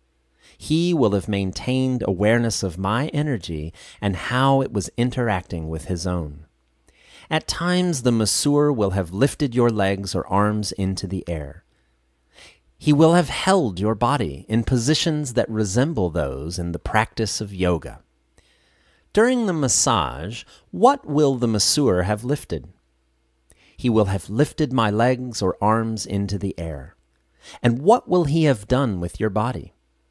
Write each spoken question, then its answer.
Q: And what will he have done with your body?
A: He will have held my body in positions that resemble those in the practice of yoga.